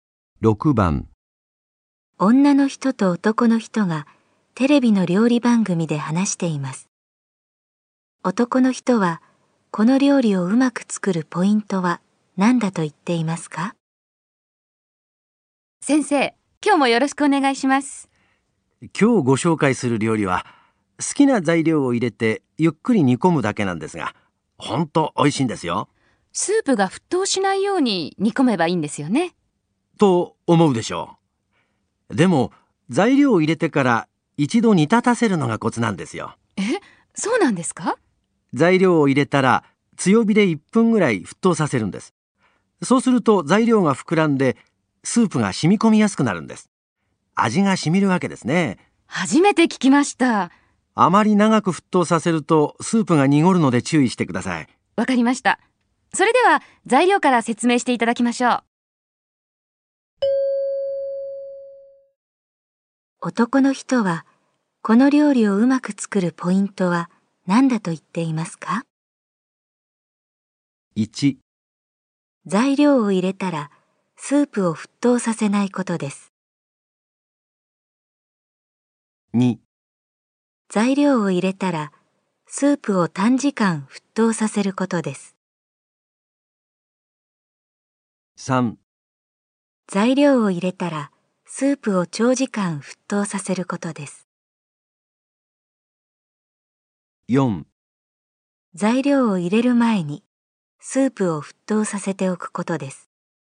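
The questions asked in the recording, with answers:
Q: 男の人はこの料理をうまく作るポイントは何だと言っていますか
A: 2: 材料を入れたらスープを短時間沸騰させることです。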